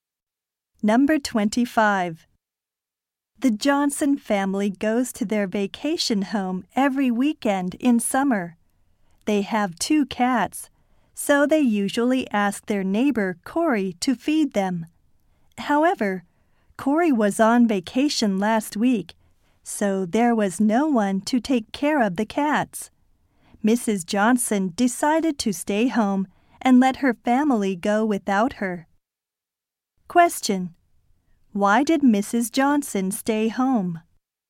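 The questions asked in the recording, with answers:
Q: Why did Mrs. Johnson stay home?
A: To take care of the cats because Corey was away.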